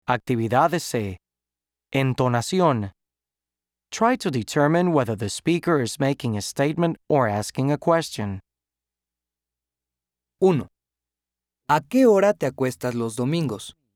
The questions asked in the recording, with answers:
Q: Try to determine whether the speaker is making a statement or asking a question.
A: This is a question.